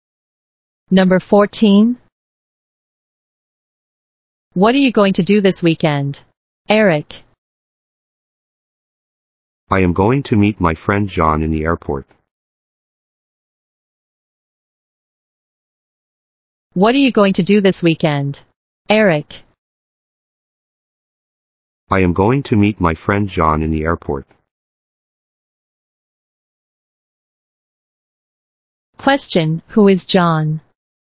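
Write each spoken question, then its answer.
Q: who is John?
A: Eric's friend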